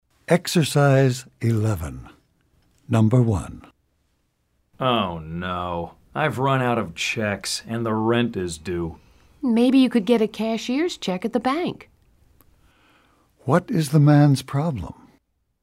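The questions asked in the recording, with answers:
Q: What is the man's problem?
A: He has run out of checks and the rent is due.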